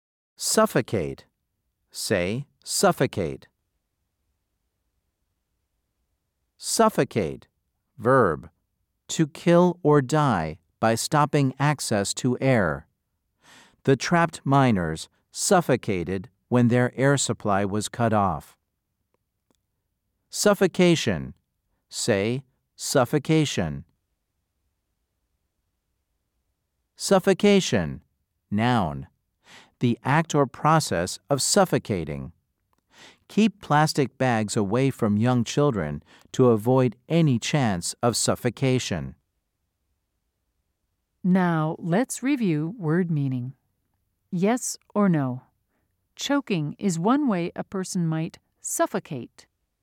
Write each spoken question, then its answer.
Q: Yes or no? Choking is one way a person might suffocate.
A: If you said yes, you are correct.